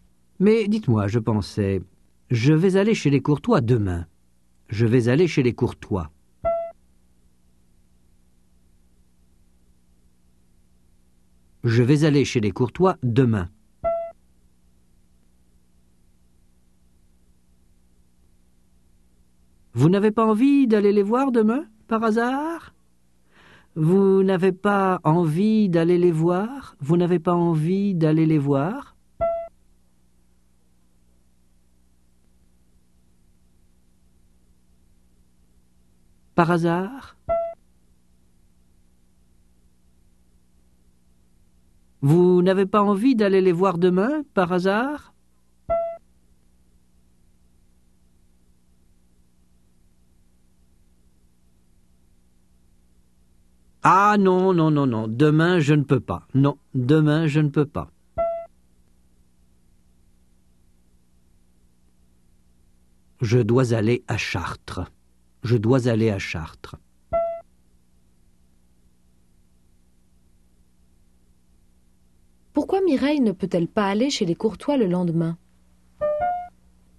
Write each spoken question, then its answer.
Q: Pourquoi Mireille ne peut-elle pas aller chez les Courtois le lendemain?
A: Parce qu'elle doit aller à Chartres.